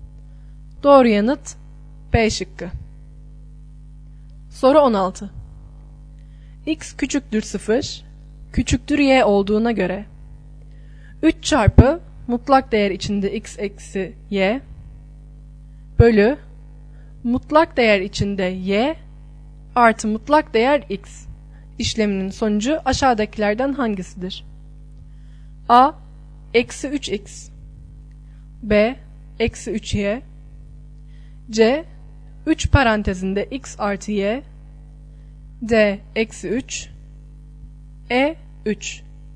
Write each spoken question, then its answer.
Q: X küçüktür 0, küçüktür y olduğuna göre 3 çarpı mutlak değer içinde x eksi y bölü mutlak değer içinde y artı mutlak değer x işleminin sonucu aşağıdakilerden hangisidir?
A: Doğru yanıt E şıkkı.